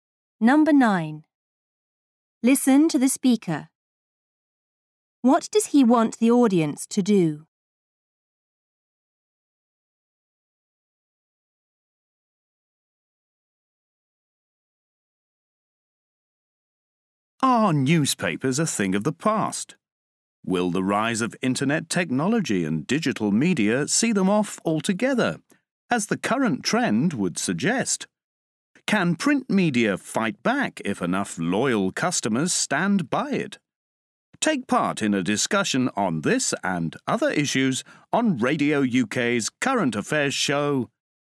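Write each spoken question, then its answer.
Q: What does he want the audience to do?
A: Take part in a discussion on Radio UK's Current Affairs show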